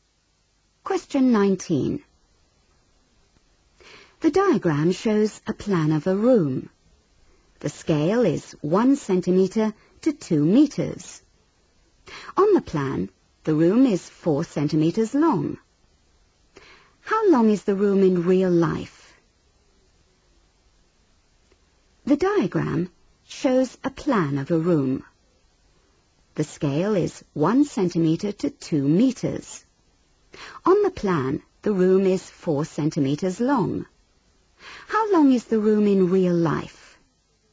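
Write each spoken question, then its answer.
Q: How long is the room in real life?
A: 8 metres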